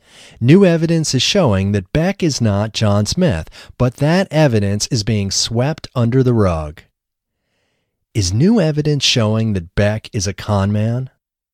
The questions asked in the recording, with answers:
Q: Is new evidence showing that Beck is a con man?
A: No, new evidence isn't showing that Beck is a con man.